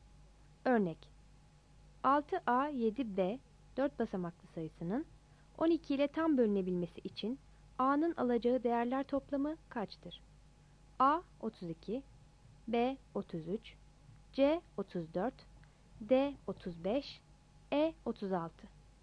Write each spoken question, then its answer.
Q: Örnek: 6A7B 4 basamaklı sayısının 12 ile tam bölünebilmesi için A'nın alacağı değerler toplamı kaçtır?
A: Yanıt B'dir.